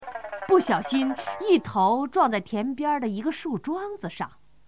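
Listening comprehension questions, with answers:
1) 不〇〇一头撞在田边儿的一个树桩子上,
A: 小心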